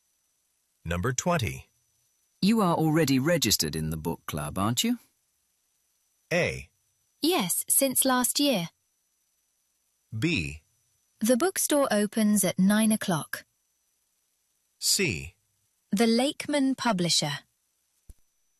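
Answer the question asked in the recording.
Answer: A: Yes, since last year.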